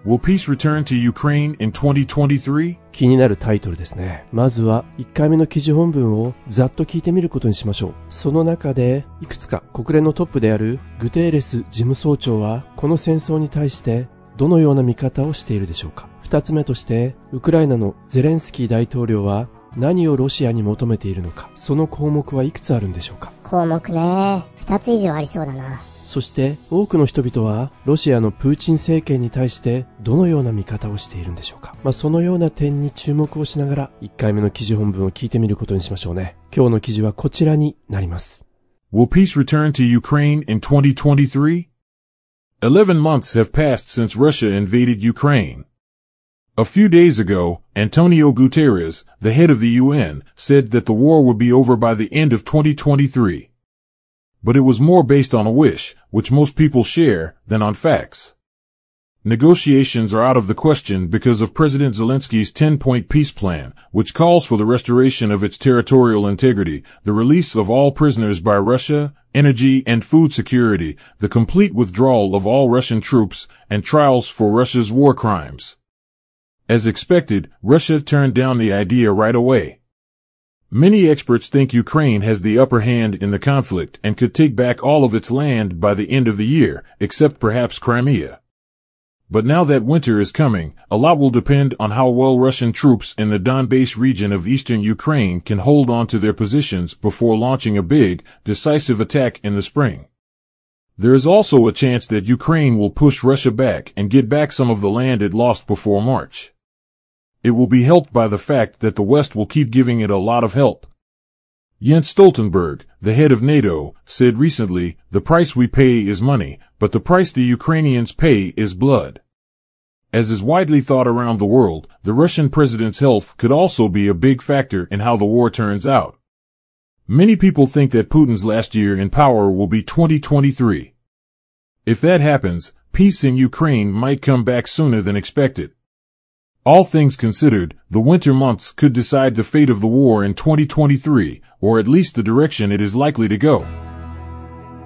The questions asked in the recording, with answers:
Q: その中でいくつか国連のトップであるグテーレス事務総長はこの戦争に対してどのような見方をしているでしょうか。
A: 2023年の終わりには、末には戦争が終わるだろうってグテーレス事務総長は言ったんだね。

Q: そして多くの人々はロシアのプーチン政権に対してどのような見方をしているんでしょうか。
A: 2023年でプーチン政権のそのパワーは終わってしまうと考えている。